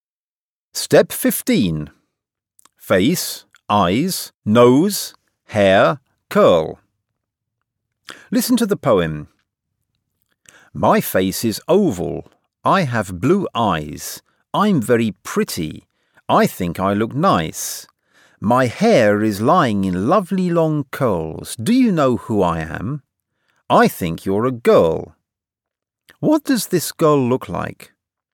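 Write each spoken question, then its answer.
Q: What does this girl look like?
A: Oval face, blue eyes, long curly hair, pretty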